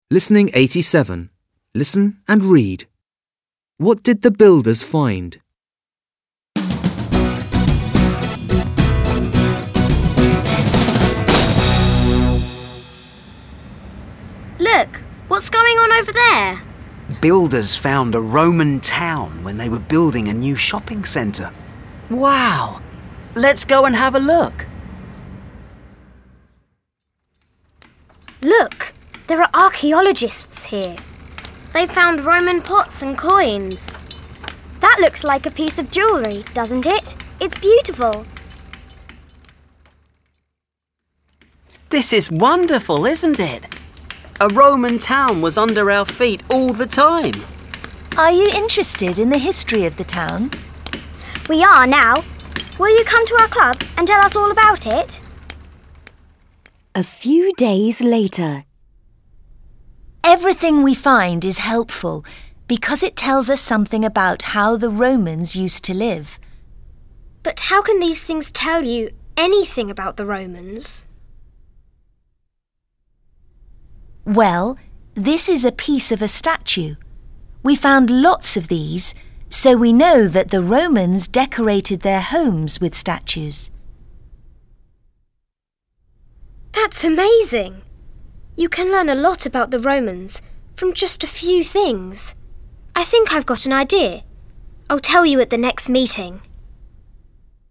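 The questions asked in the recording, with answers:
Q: What did the builders find?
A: A Roman town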